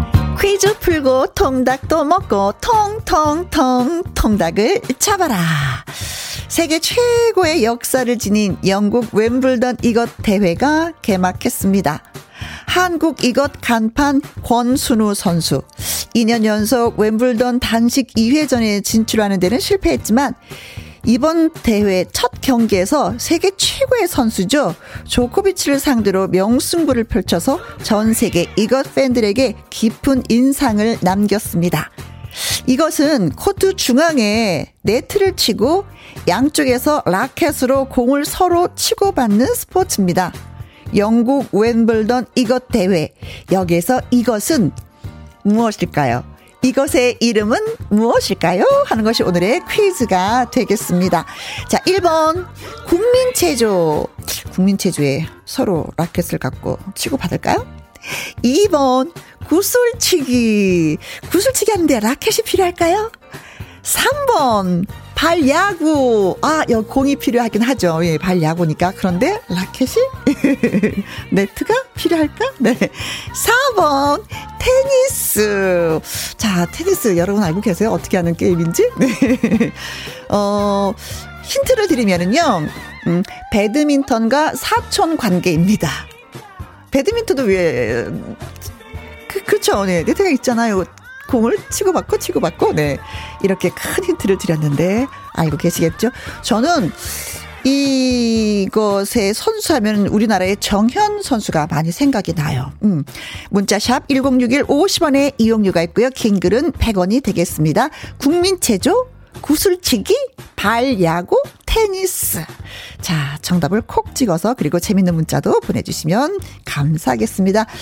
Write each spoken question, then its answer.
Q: 영국 웬블던 이것 대회. 여기에서 이것은 무엇일까요?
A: 자, 그래서 오늘의 정답은 테니스. 맞습니다.